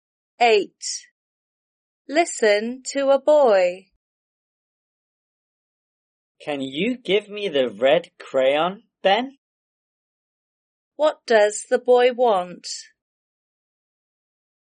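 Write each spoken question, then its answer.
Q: What does the boy want?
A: the red crayon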